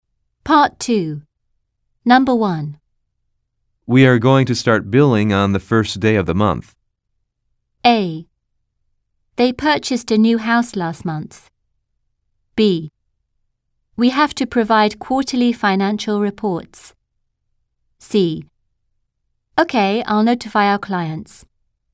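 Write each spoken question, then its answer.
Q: We are going to start billing on the first day of the month.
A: C: Okay, I'll notify our clients.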